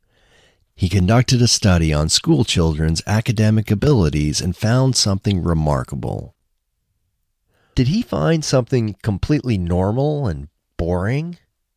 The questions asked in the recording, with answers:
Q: Did he find something completely normal and boring?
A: No, he didn't find something completely normal and boring.